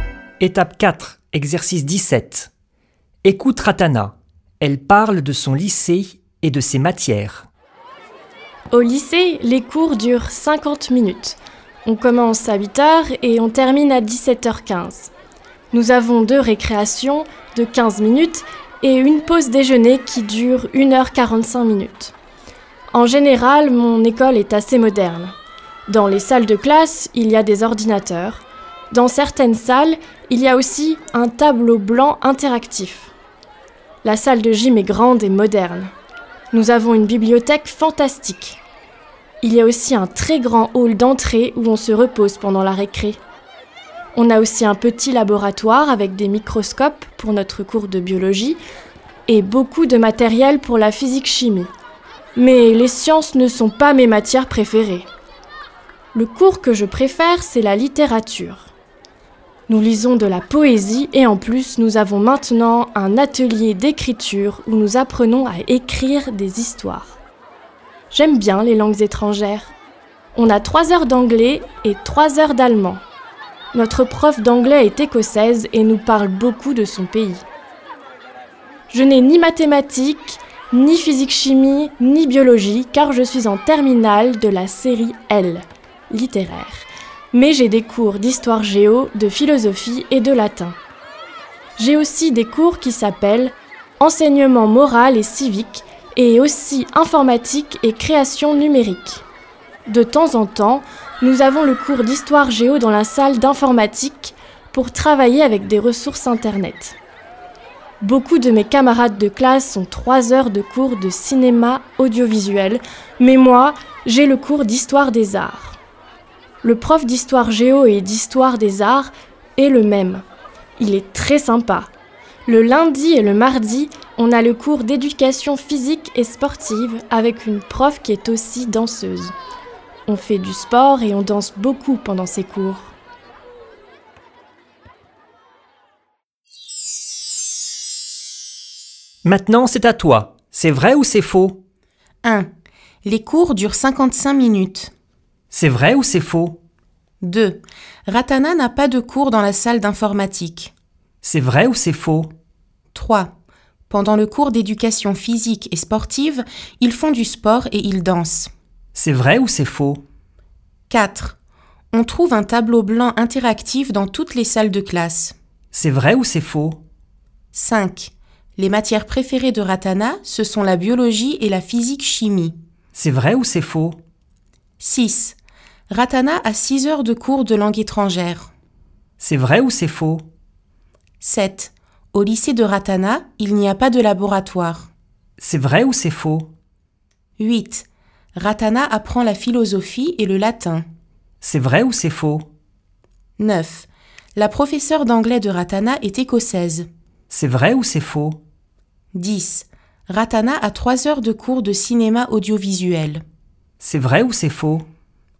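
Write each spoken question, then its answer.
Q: Les cours durent 55 minutes.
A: faux

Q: Ratana n'a pas de cours dans la salle d'informatique.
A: faux

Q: Pendant le cours d'éducation physique et sportive, ils font du sport et ils dansent.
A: vrai

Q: On trouve un tableau blanc interactif dans toutes les salles de classe.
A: faux

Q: Les matières préférées de Ratana, ce sont la biologie et la physique-chimie.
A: faux

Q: Ratana a 6 heures de cours de langue étrangère.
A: vrai

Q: Au lycée de Ratana, il n'y a pas de laboratoire.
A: faux

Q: Ratana apprend la philosophie et le latin.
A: vrai

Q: La professeure d'anglais de Ratana est écossaise.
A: vrai

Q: Ratana a 3 heures de cours de cinéma audiovisuel.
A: faux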